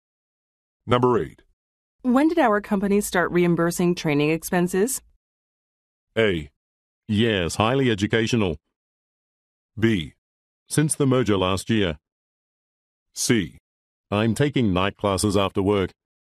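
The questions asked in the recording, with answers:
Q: When did our company start reimbursing training expenses?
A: B: Since the merger last year.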